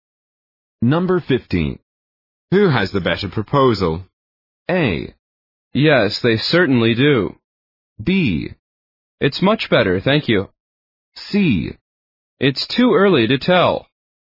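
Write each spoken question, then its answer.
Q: Who has the better proposal?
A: C: It's too early to tell.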